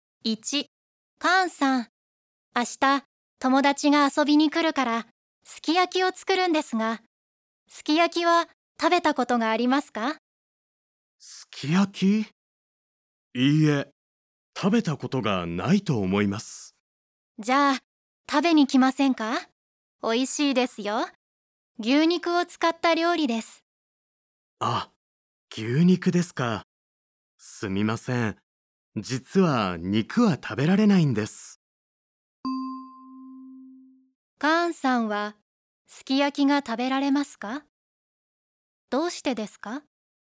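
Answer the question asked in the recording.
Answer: いいえ、食べられません。肉が食べられないからです。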